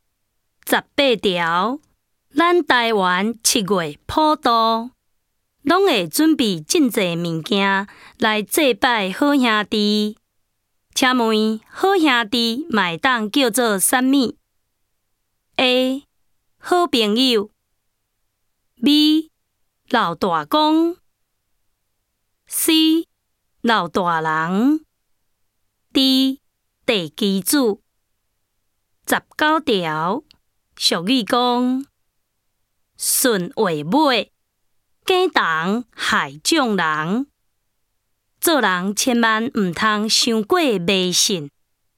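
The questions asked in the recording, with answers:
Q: 请问好兄弟麦当叫做啥物 ?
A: B: 老大公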